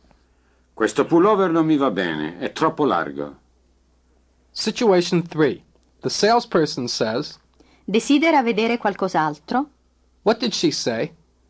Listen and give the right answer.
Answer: Do you wish to see something else?